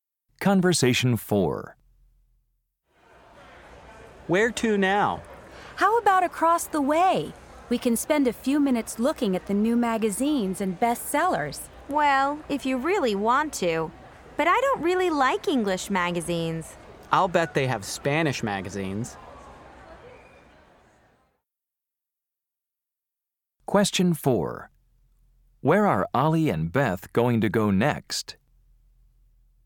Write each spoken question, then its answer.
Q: Where are Ollie and Beth going to go next?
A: Nah, you two go to the bookstore.